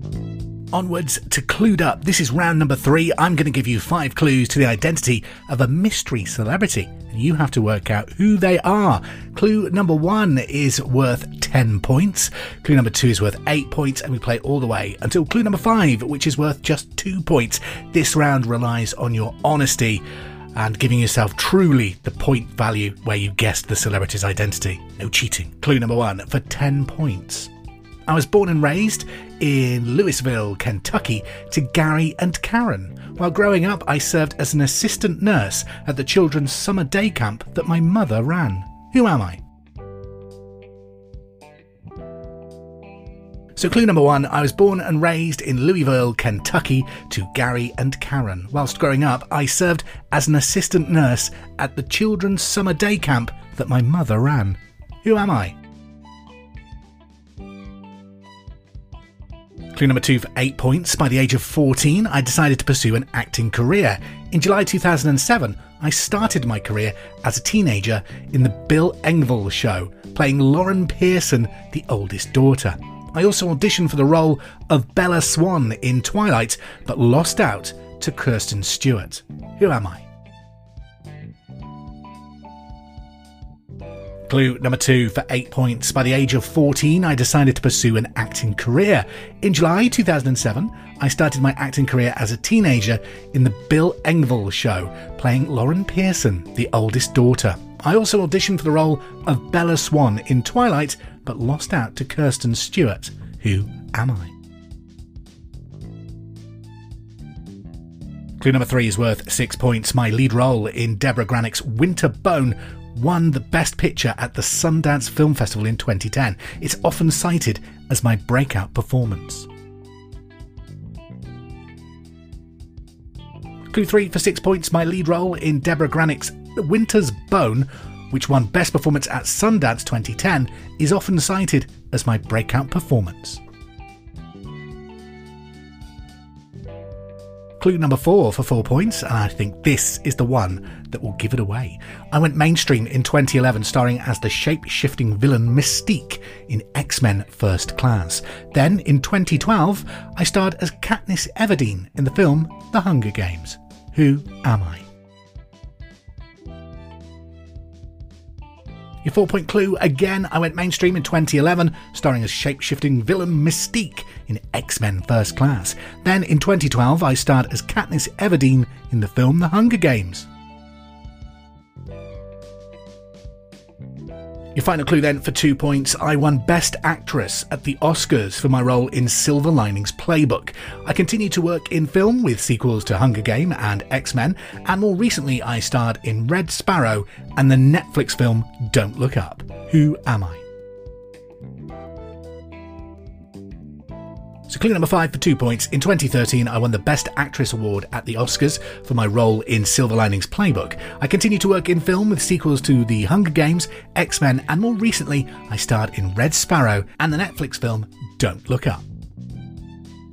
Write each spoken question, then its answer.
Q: Who am I?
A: We were, of course, looking for Jennifer Lawrence.